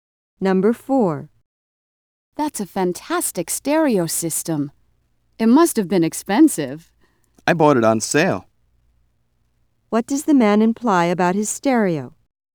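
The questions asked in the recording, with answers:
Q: What does the man imply about his stereo?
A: It wasn't as expensive as it looks; he got it at a reduced price.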